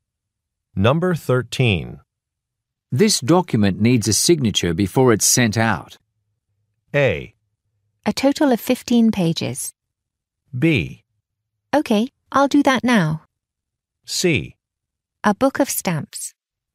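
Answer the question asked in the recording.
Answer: B: Okay, I'll do that now.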